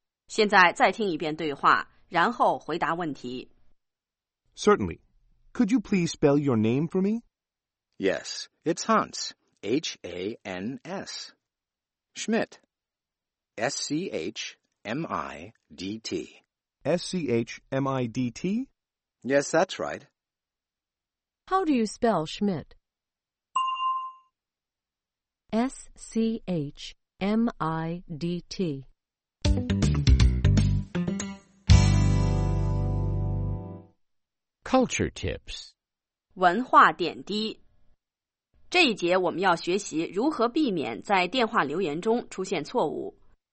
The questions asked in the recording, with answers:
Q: How do you spell Schmidt?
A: S-C-H.M-I-D-T.